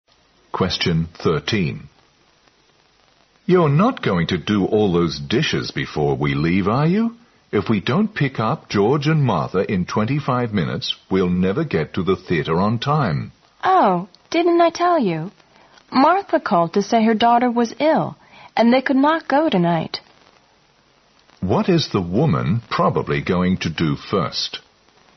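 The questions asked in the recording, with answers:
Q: What is the woman probably going to do first?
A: Do the dishes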